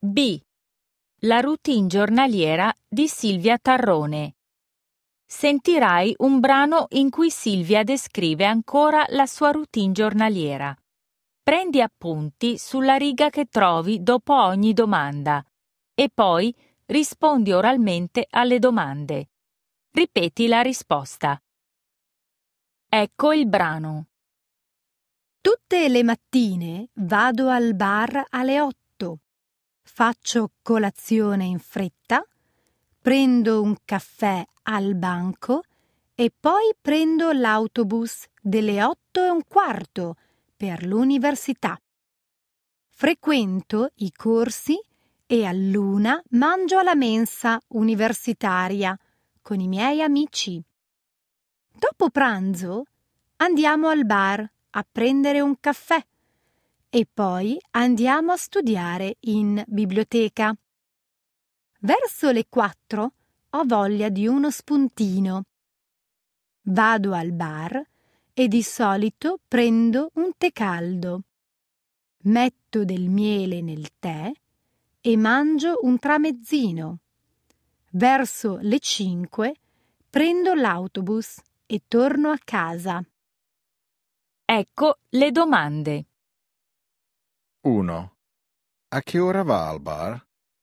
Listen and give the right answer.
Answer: Alle 8.